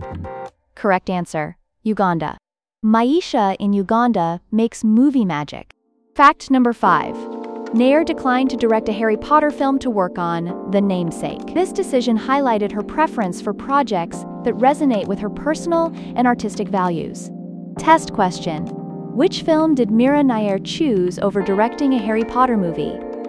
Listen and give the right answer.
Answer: Correct answer, The Namesake.